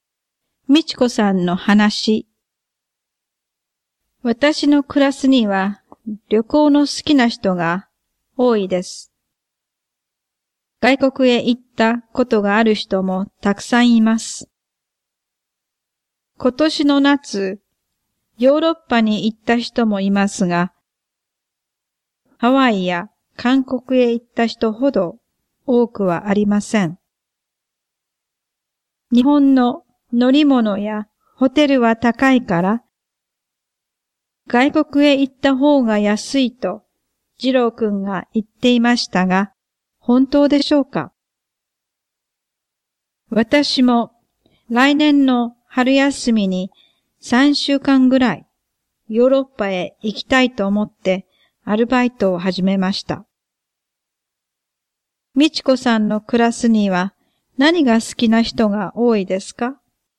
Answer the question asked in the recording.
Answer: 旅行が好きな人が多いです。